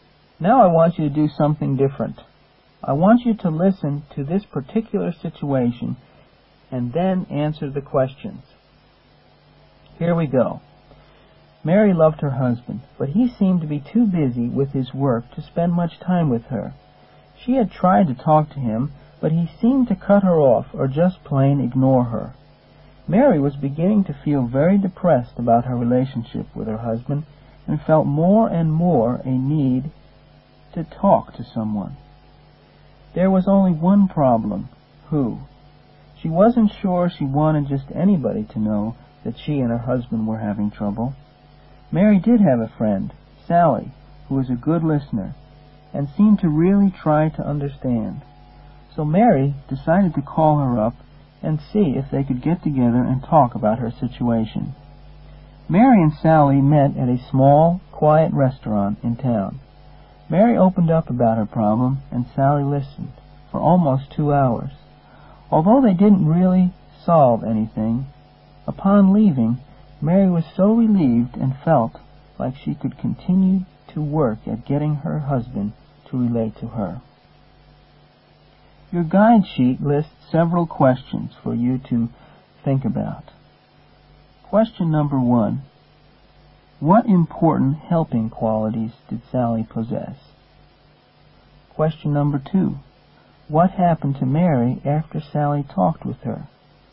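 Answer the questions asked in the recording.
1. She was a good listener who really tried to understand
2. Mary felt relieved and felt she could keep working at getting her husband to relate to her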